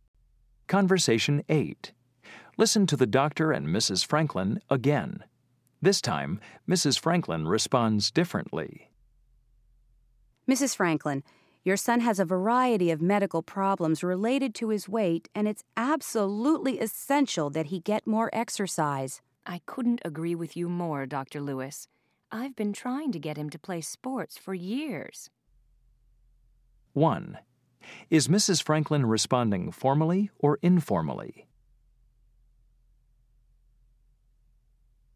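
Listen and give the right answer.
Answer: formally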